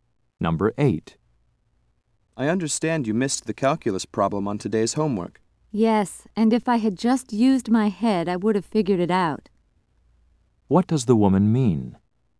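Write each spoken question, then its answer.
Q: What does the woman mean?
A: She could have solved it if she had thought carefully.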